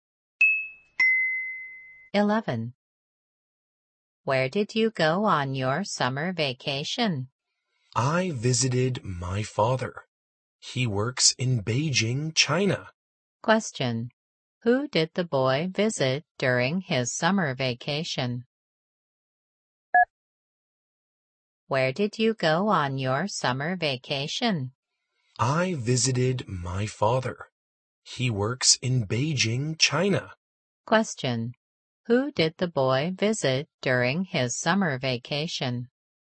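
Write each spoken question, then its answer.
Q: Who did the boy visit during his summer vacation?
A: His father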